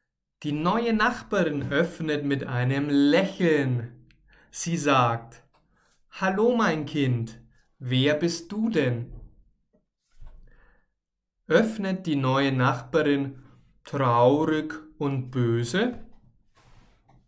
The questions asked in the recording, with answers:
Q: Öffnet die neue Nachbarin traurig und böse?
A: Nein, die neue Nachbarin öffnet nicht traurig und sie ist auch nicht böse, sondern sie öffnet mit einem Lächeln.